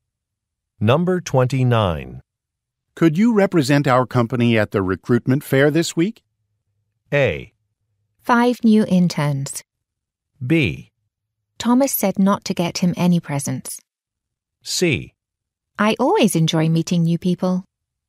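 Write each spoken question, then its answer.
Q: Could you represent our company at the recruitment fair this week?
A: C: I always enjoy meeting new people.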